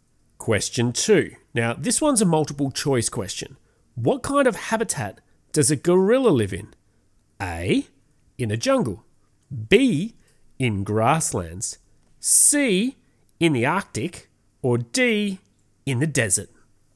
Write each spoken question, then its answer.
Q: What kind of habitat does a gorilla live in?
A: Gorillas live in jungles